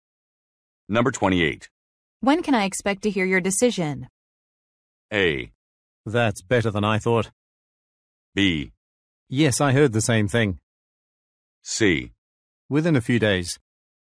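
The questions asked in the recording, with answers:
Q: When can I expect to hear your decision?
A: C: Within a few days.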